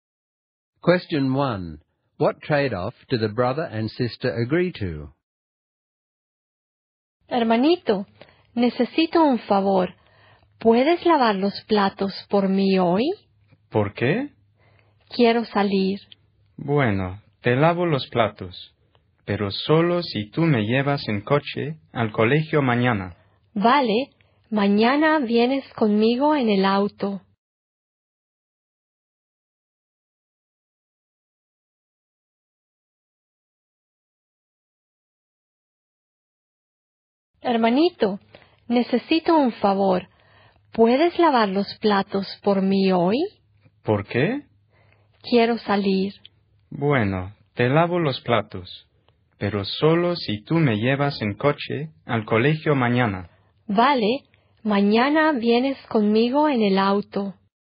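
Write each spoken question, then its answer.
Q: What trade-off do the brother and sister agree to?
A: He washes the dishes for her today if she drives him to school tomorrow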